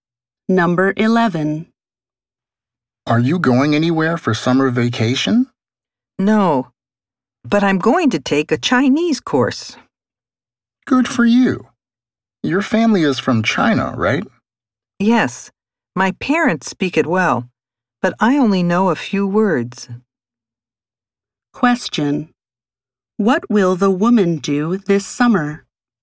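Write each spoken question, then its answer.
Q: What will the woman do this summer?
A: Take a Chinese course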